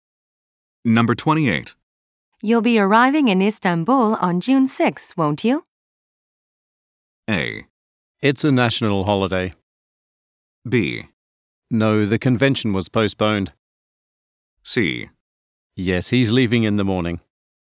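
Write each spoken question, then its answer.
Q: You'll be arriving in Istanbul on June 6, won't you?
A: B: No, the convention was postponed.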